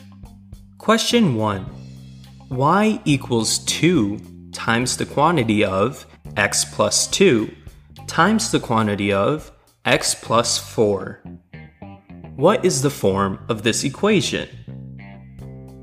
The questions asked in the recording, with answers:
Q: What is the form of this equation?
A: This equation is in the factored form.